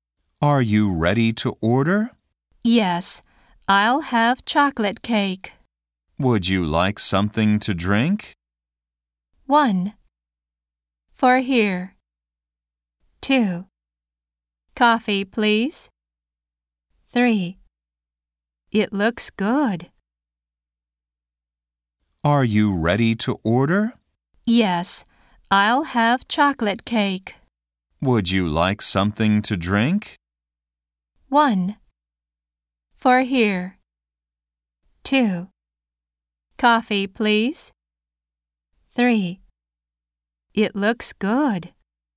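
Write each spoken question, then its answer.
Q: Would you like something to drink?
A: 2: Coffee, please.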